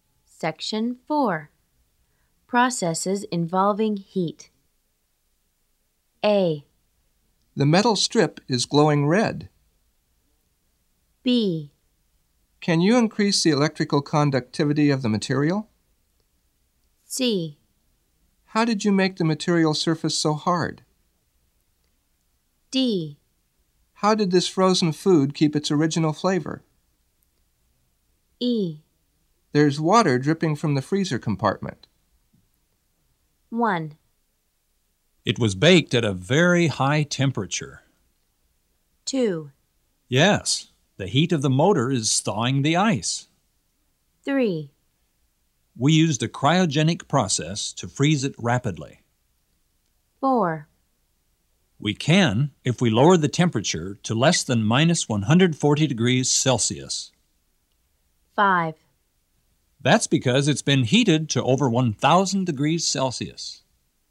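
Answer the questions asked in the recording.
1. C: How did you make the material surface so hard?
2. E: There's water dripping from the freezer compartment.
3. D: How did this frozen food keep its original flavor?
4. B: Can you increase the electrical conductivity of the material?
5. A: The metal strip is glowing red.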